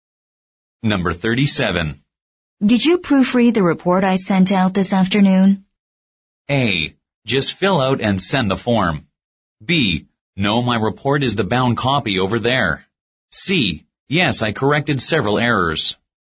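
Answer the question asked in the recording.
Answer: C: Yes, I corrected several errors.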